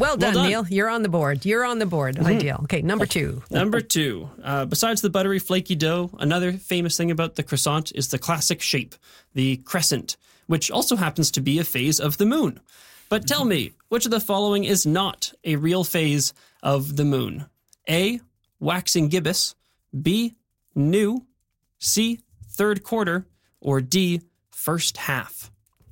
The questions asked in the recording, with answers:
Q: But tell me, which of the following is not a real phase of the moon?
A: I'm going to go with D, first half.